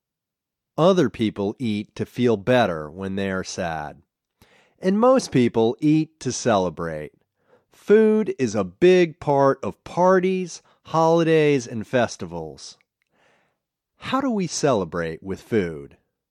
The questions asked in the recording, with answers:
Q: How do we celebrate with food?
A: Food is a big part of parties, holidays, and festivals.